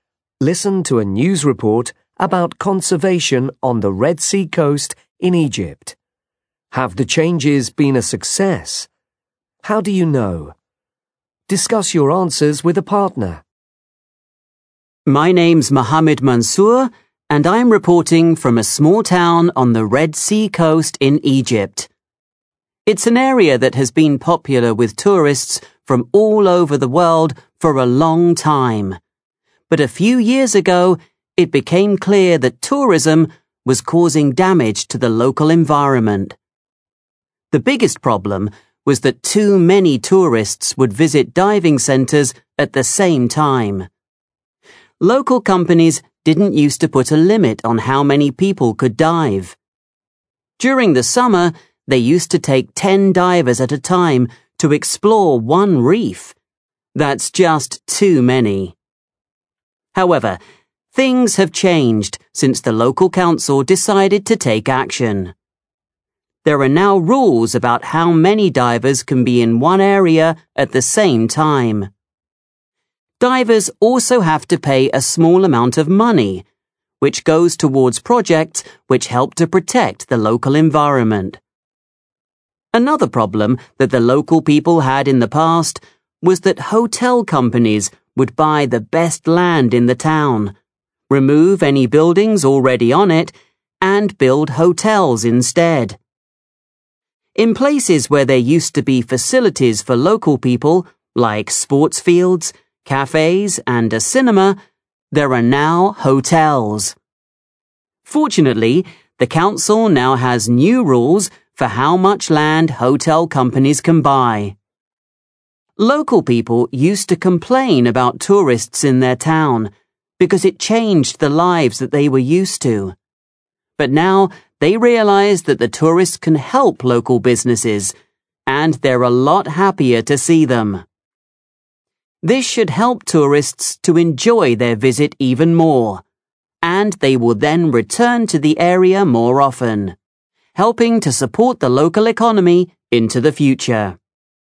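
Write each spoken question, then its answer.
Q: Have the changes been a success?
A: Yes: there are now limits on divers and on land for hotels, and local people are happier to see tourists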